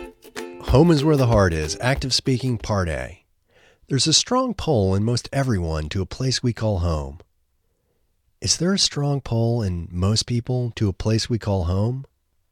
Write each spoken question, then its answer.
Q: Is there a strong pull in most people to a place we call home?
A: Yes, there's a strong pull in most people to a place we call home.